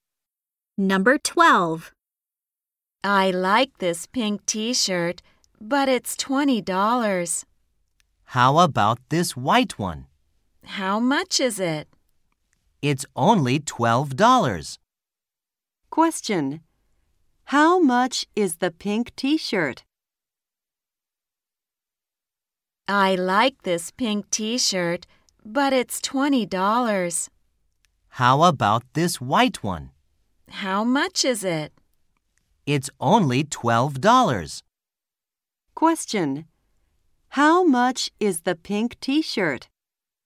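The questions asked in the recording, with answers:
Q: How much is the pink t-shirt?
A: $20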